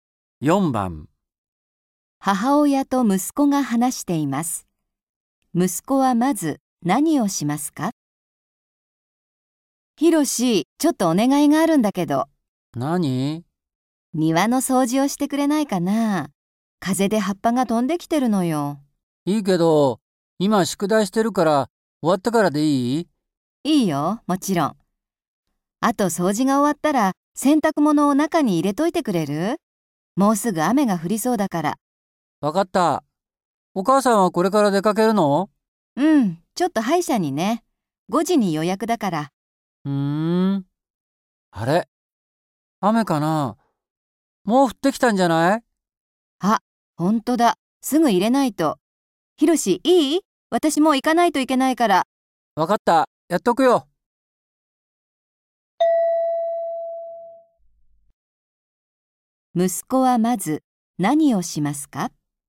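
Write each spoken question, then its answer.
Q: 息子はまず何をしますか?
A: 洗濯物を中に入れる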